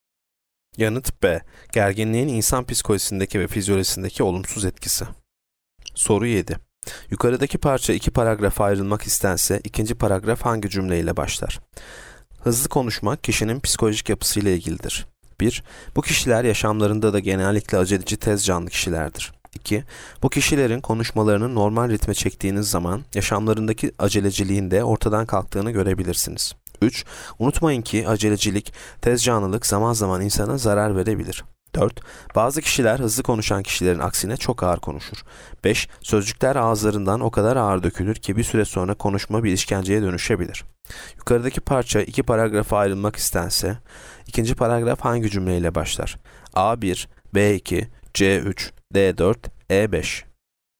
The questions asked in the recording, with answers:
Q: Yukarıdaki parça iki paragrafa ayrılmak istense ikinci paragraf hangi cümleyle başlar?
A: Yanıt D, 4. Bazı kişiler hızlı konuşan kişilerin aksine çok ağır konuşur.